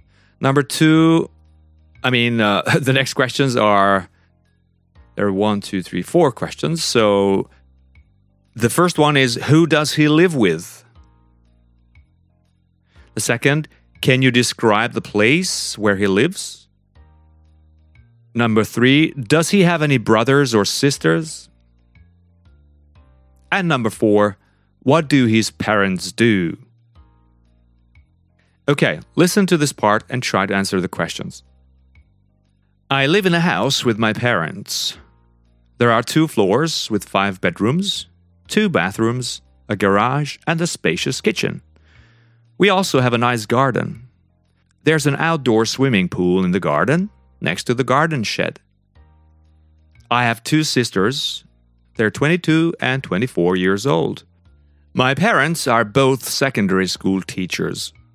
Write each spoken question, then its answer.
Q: Can you describe the place where he lives?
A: Well, he lives in a house, and the house has uh, two Two floors, five bedrooms, two bathrooms, a garage, and a spacious kitchen.

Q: Does he have any brothers or sisters?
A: Yeah, we said that, yeah, he has two sisters.

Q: What do his parents do?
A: His parents are secondary school teachers, both.